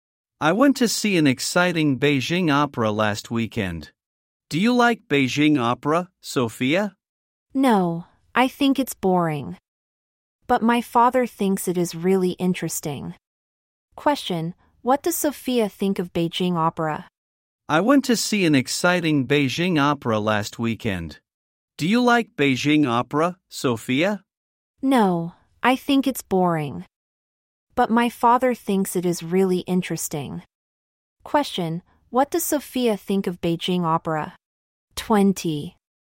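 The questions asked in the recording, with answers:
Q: Question: What does Sophia think of Beijing opera?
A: Boring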